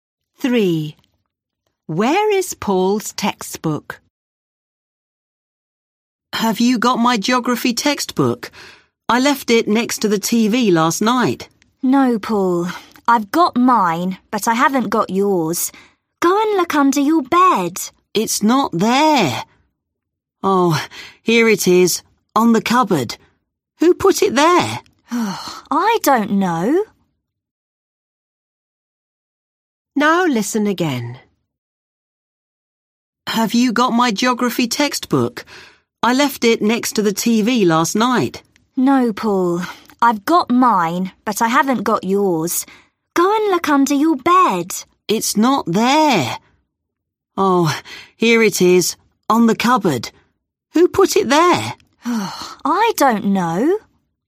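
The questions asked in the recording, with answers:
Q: Where is Paul's textbook?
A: On the cupboard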